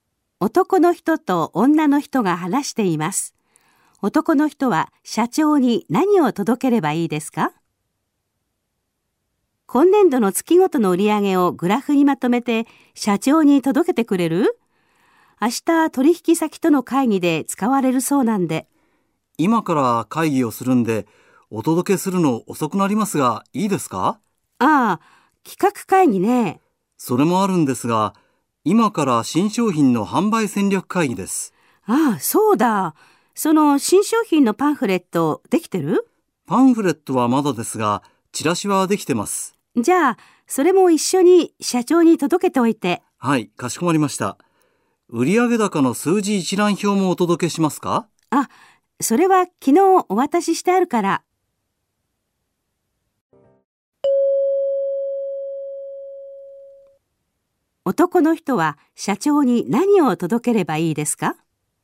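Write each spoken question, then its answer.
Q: 男の人は社長に何を届ければいいですか?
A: 月ごとの売上のグラフと新商品のチラシ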